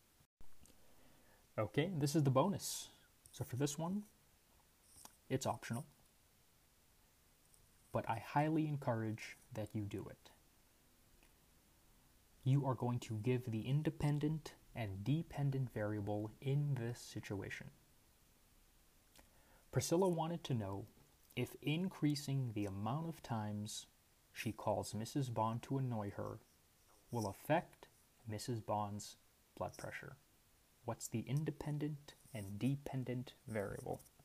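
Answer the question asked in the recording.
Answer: Independent: number of times she calls Mrs. Bond; dependent: Mrs. Bond's blood pressure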